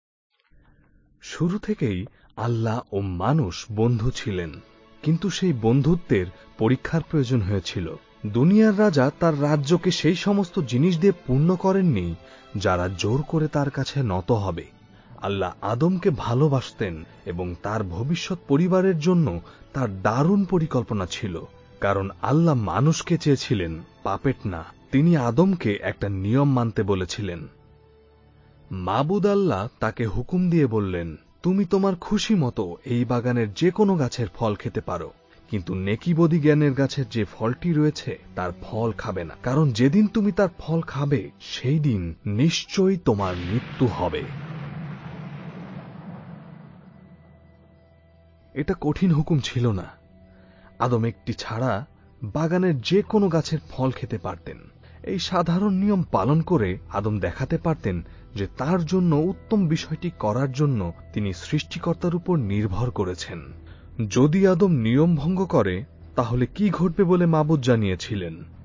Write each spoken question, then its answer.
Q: যদি আদম নিয়ম ভঙ্গ করে তাহলে কি ঘটবে বলে মাবুদ জানিয়েছিলেন?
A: আল্লাহ আদমকে বলেছিলেন, যেদিন তুমি খাবে সেদিন নিশ্চয়ই তুমি মরবে।